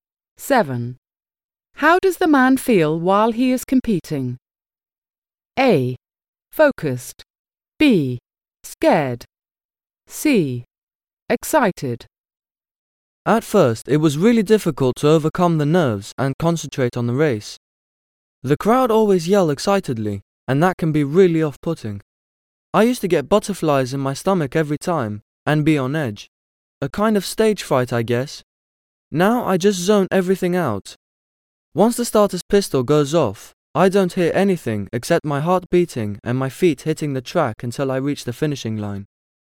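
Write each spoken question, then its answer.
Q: How does the man feel while he is competing?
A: A: Focused.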